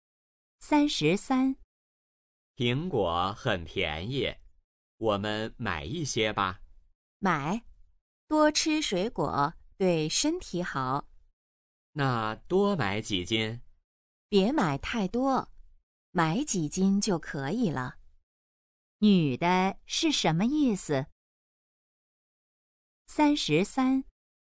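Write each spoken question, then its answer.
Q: 女的是什么意思?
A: 别买太多,买几斤就可以了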